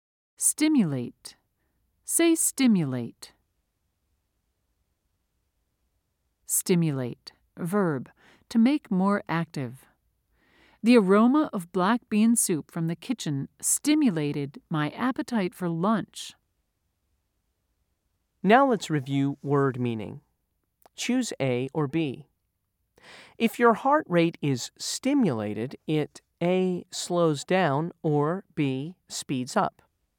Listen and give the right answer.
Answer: If you said B, you're right.